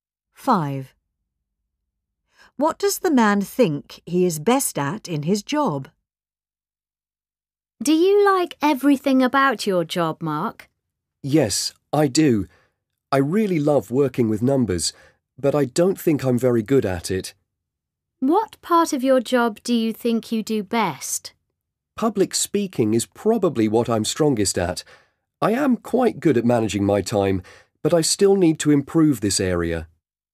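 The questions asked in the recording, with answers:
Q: What does the man think he is best at in his job?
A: Public speaking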